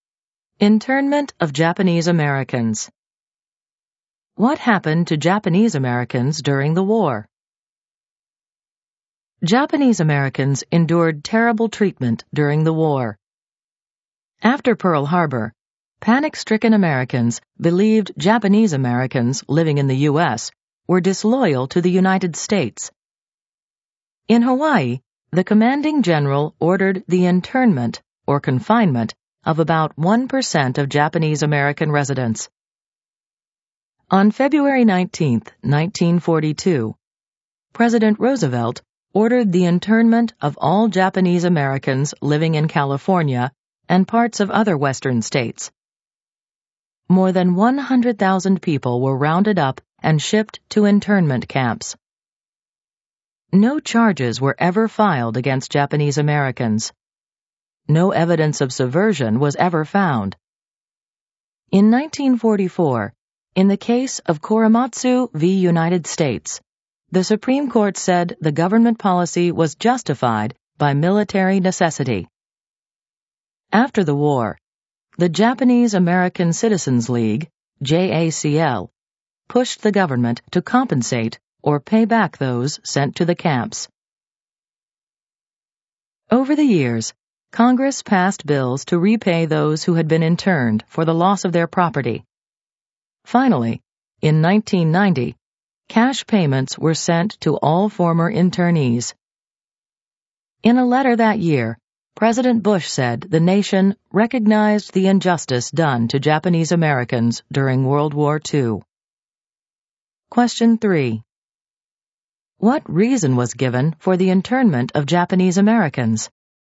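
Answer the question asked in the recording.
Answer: Military necessity (fear that Japanese Americans were disloyal)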